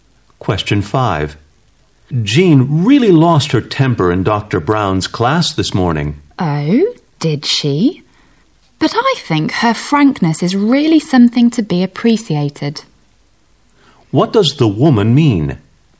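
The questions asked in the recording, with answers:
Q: What does the woman mean?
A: She admires Jean's frankness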